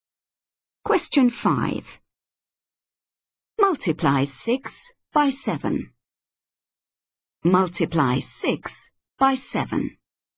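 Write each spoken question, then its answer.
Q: Multiply 6 by 7.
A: 42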